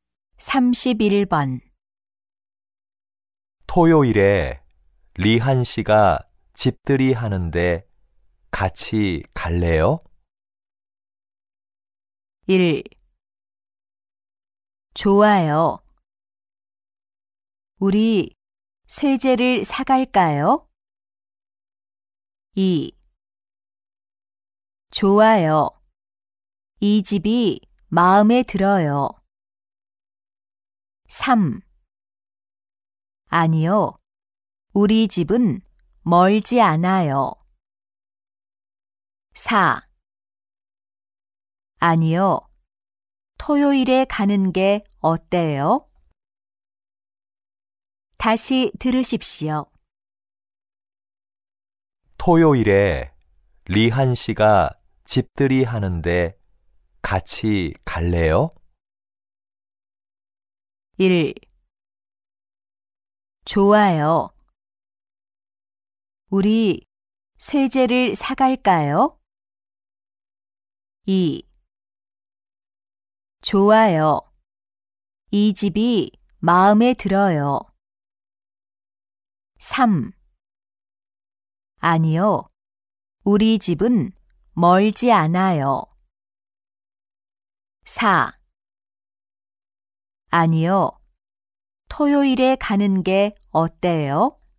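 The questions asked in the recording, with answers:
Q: 토요일에 리한 씨가 집들이 하는데 같이 갈래요?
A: 1: 좋아요. 우리 세제를 사갈까요?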